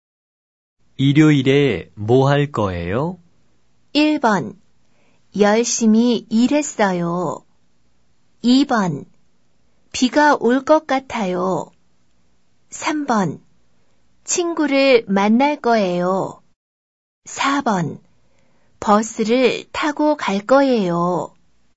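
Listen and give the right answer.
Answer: 3: 친구를 만날 거예요.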